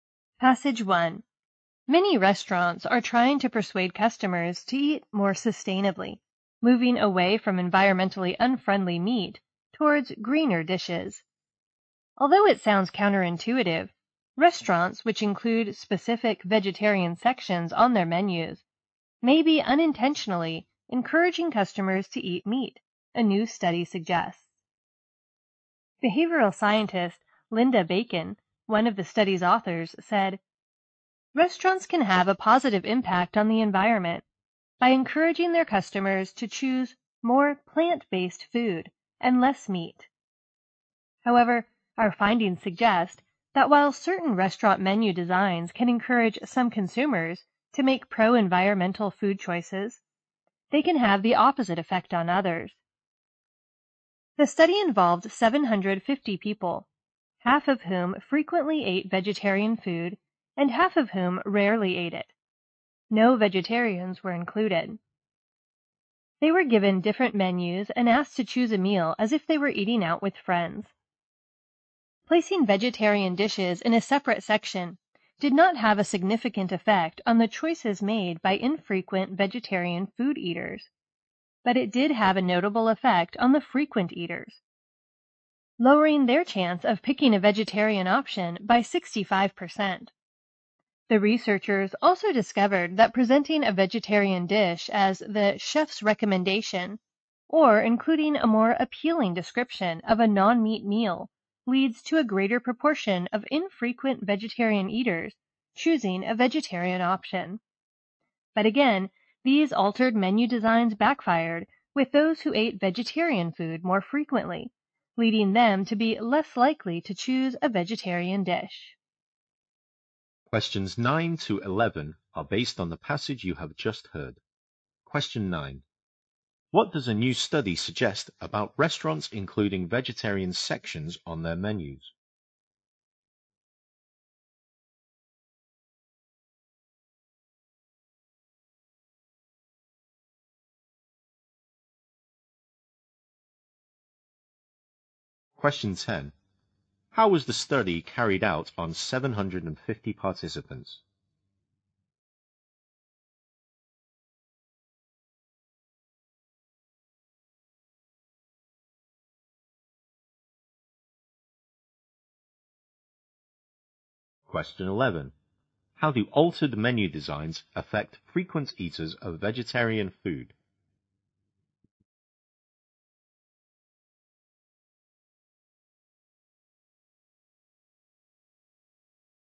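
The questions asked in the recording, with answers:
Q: What does a new study suggest about restaurants including vegetarian sections on their menus?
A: They may unintentionally encourage customers to eat meat

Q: How was the study carried out on 750 participants?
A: They were given different menus and asked to choose a meal as if eating out with friends

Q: How do altered menu designs affect frequent eaters of vegetarian food?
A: They make them less likely to choose a vegetarian dish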